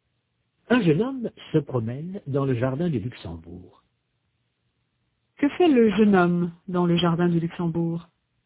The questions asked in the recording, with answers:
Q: Que fait le jeune homme dans le jardin du Luxembourg?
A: Il se promène.